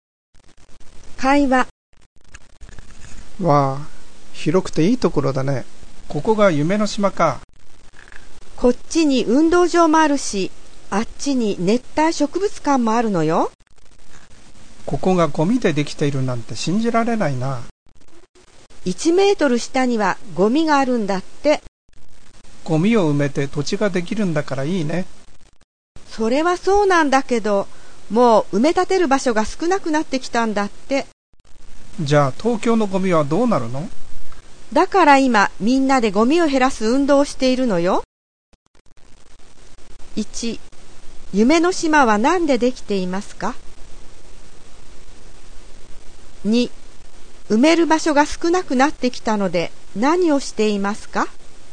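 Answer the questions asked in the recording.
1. ゴミ
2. ゴミを減らす運動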